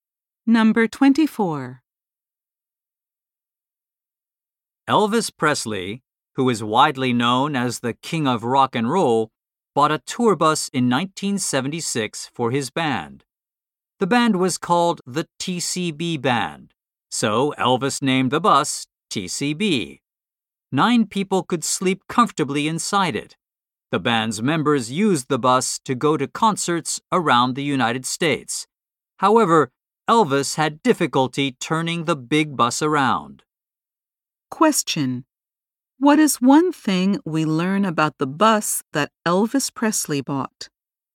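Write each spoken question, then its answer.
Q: What is one thing we learn about the bus that Elvis Presley bought?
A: Nine people could sleep comfortably inside it.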